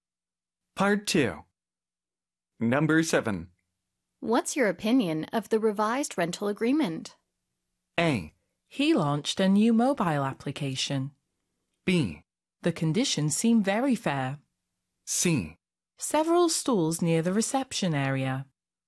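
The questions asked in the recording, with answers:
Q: What's your opinion of the revised rental agreement?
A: B: The conditions seem very fair.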